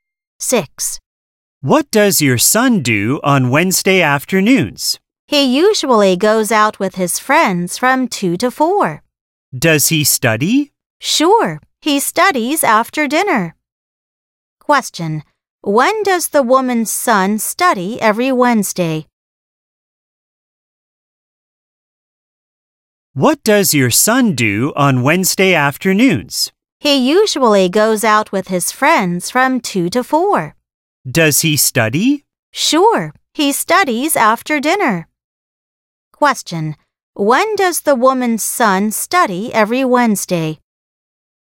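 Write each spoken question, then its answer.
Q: When does the woman's son study every Wednesday?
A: After dinner.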